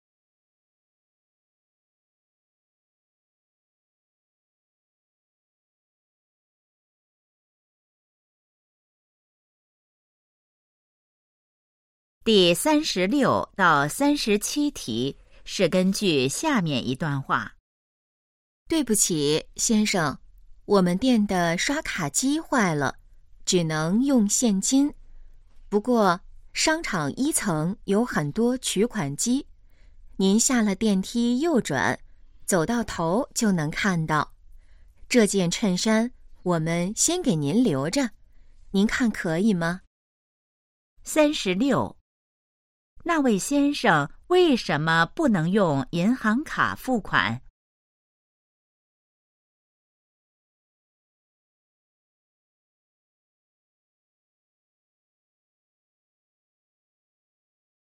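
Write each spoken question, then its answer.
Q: 那位先生为什么不能用银行卡付款?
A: 刷卡机坏了

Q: 哪里有取款机?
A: 商场1层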